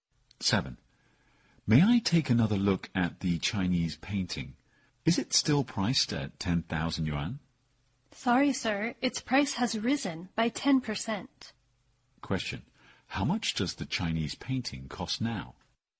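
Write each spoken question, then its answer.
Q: How much does the Chinese painting cost now?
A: 11,000 yuan.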